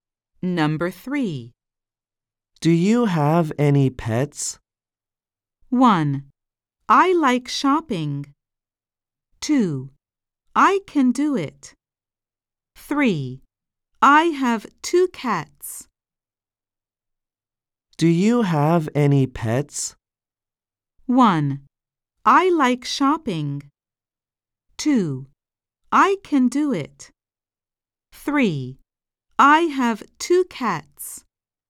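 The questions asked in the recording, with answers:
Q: Do you have any pets?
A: 3: I have 2 cats.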